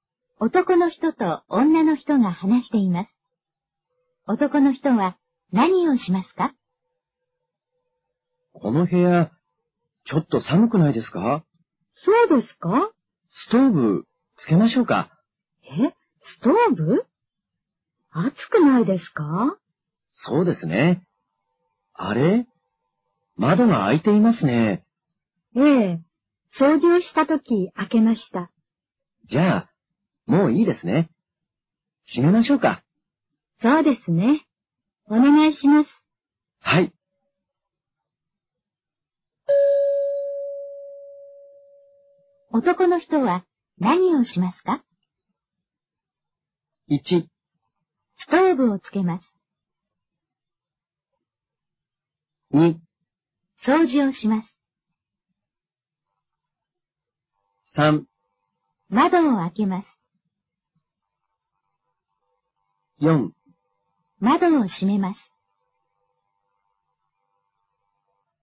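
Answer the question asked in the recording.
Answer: 4: 窓を閉めます。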